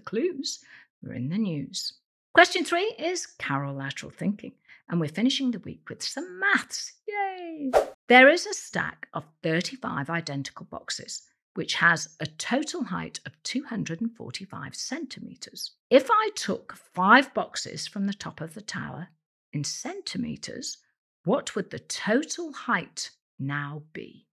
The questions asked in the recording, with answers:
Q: If I took five boxes from the top of the tower in centimetres, what would the total height now be?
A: And the answer is 210 centimetres.